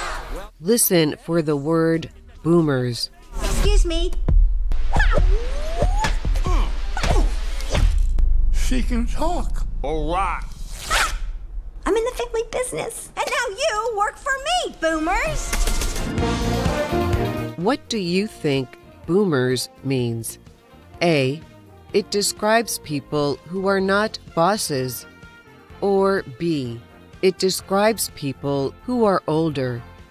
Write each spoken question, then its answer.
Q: What do you think boomers means?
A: The answer is B. Boomers describes older people.